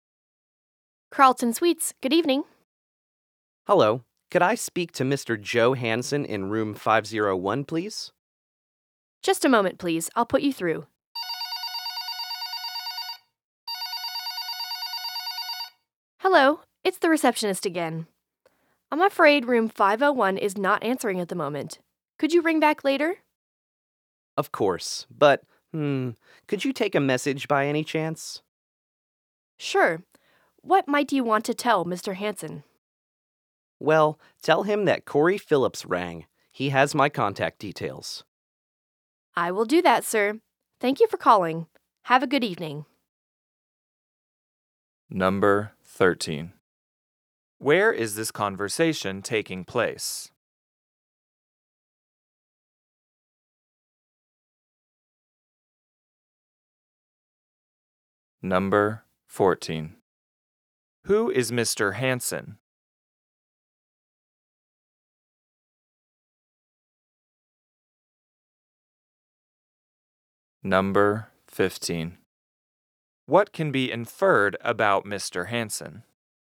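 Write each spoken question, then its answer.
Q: Where is this conversation taking place?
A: At a hotel (Carlton Suites), by phone with the receptionist

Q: Who is Mr. Hansen?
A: A guest staying in room 501 of the hotel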